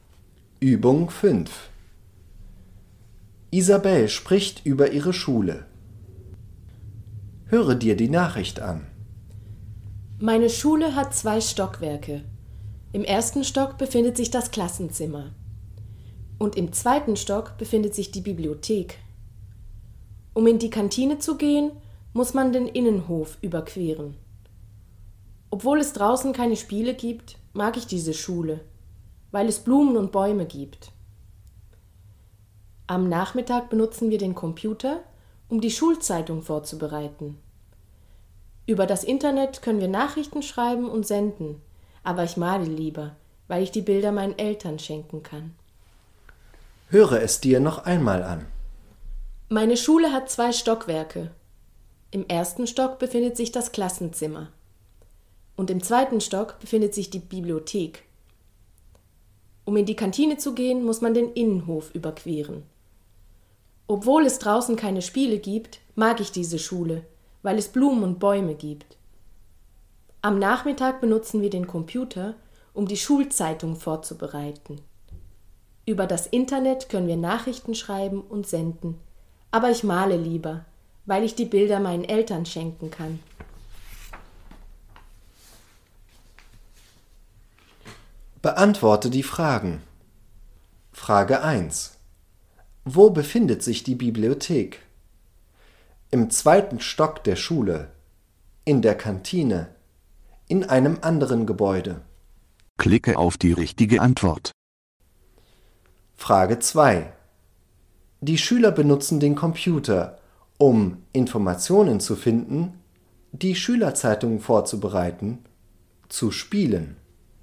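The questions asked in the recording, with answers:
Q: Wo befindet sich die Bibliothek?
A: Im 2. Stock der Schule

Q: Die Schüler benutzen den Computer, um Informationen zu finden, die Schülerzeitung vorzubereiten, zu spielen.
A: die Schülerzeitung vorzubereiten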